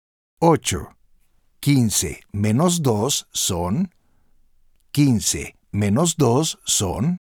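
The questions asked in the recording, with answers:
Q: 15 menos 2 son.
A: 13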